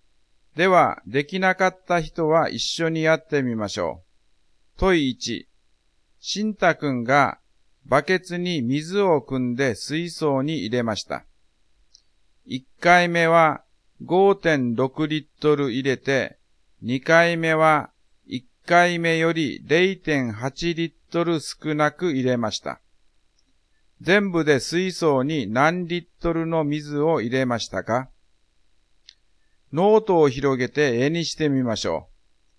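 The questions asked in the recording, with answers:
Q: 全部で水槽に何リットルの水を入れましたか?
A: 10.4リットル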